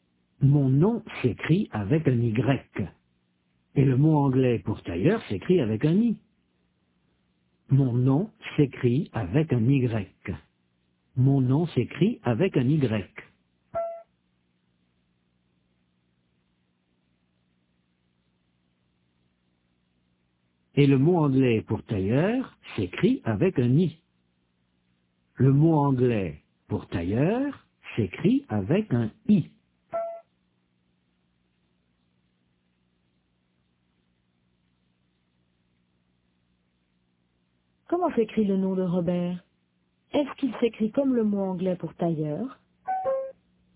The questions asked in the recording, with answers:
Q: Est-ce qu'il s'écrit comme le mot anglais pour tailleur?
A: Non, il s'écrit avec un Y.